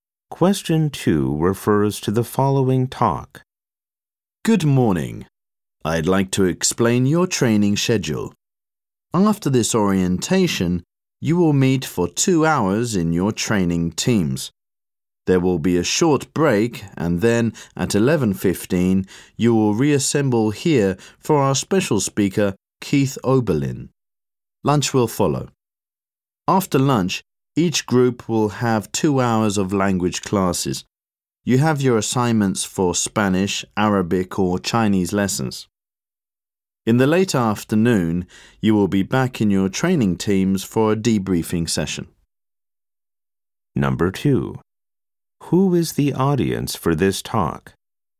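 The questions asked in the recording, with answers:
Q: Who is the audience for this talk?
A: Trainees attending an orientation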